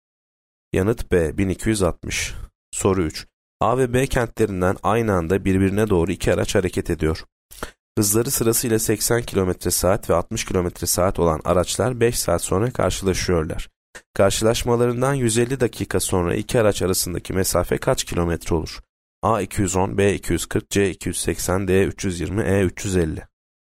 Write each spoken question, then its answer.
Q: Karşılaşmalarından 150 dakika sonra iki araç arasındaki mesafe kaç kilometre olur?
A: Yanıt E 350.